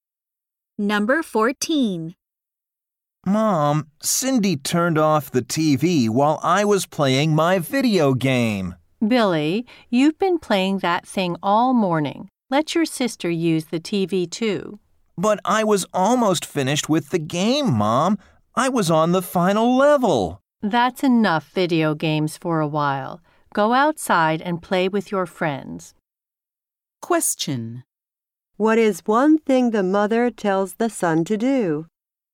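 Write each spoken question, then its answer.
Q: What is one thing the mother tells the son to do?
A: Go outside and play with his friends.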